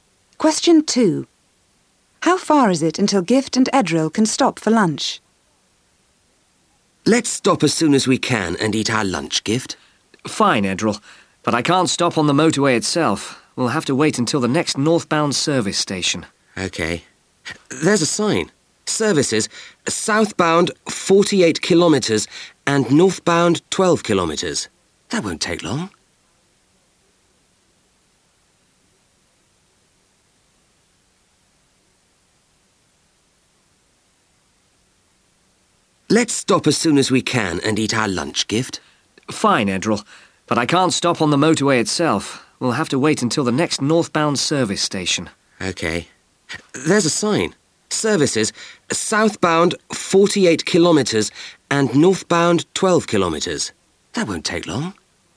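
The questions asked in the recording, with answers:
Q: How far is it until Gift and Edril can stop for lunch?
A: 12 kilometres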